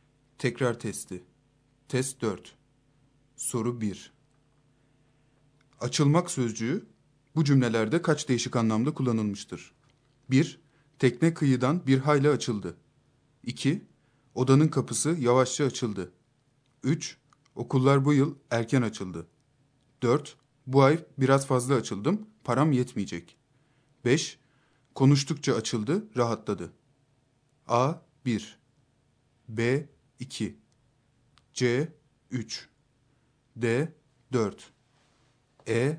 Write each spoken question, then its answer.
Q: Açılmak sözcüğü bu cümlelerde kaç değişik anlamda kullanılmıştır?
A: Doğru yanıt E şıkkı.